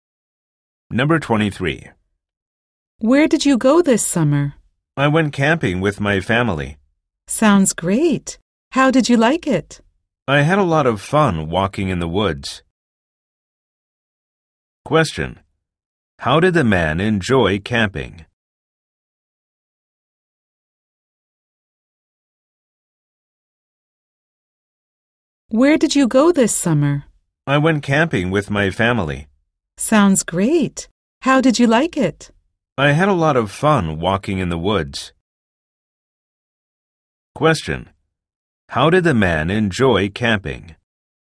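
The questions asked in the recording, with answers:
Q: How did the man enjoy camping?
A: By walking in the woods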